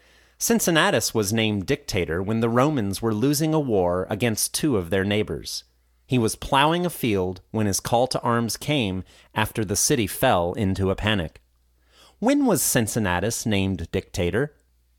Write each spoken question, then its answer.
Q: When was Cincinnatus named dictator?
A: Cincinnatus was named dictator when the Romans were losing a war against two of their neighbors.